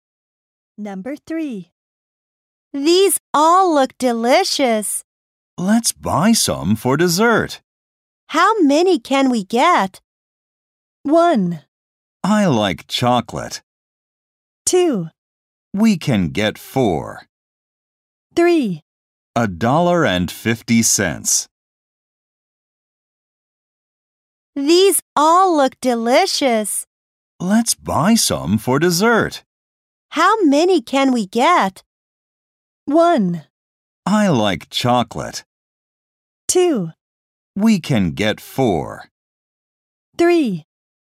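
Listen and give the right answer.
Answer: 2: We can get 4.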